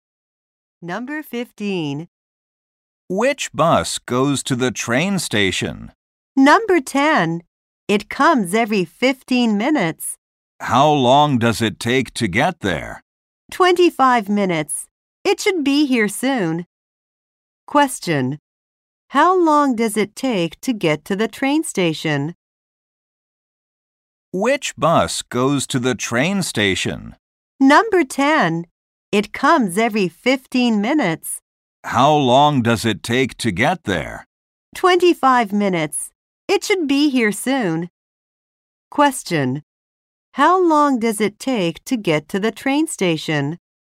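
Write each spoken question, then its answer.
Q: How long does it take to get to the train station?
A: 25 minutes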